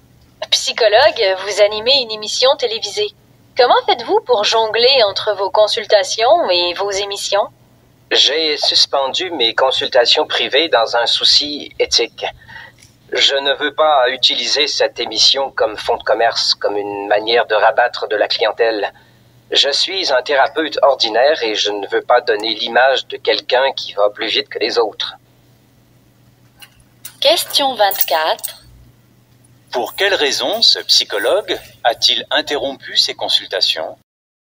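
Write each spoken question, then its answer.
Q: Pour quelle raison ce psychologue a-t-il interrompu ses consultations?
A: Pour des raisons éthiques : il ne veut pas utiliser l'émission pour attirer des clients.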